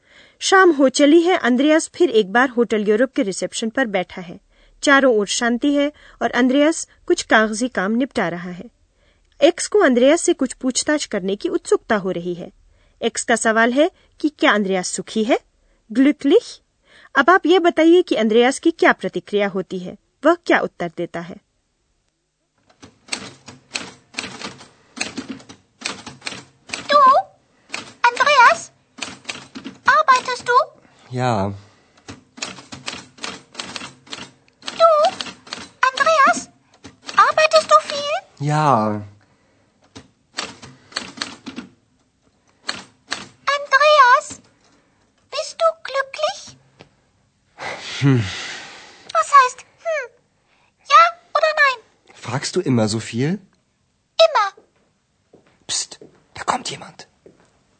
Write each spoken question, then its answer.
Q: अब आप ये बताइए कि अंद्रयास की क्या प्रतिक्रिया होती है वह क्या उत्तर देता है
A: x के सवाल पर अंद्रयास को कुछ झुंझलाहट होती है और वह x से उल्टा सवाल करता है कि क्या वह हमेशा कुछ न कुछ पूछती ही रहती है